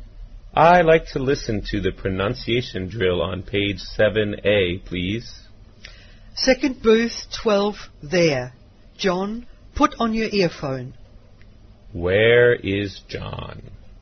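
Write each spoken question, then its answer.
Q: Where is John?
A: In a language lab (booth 12).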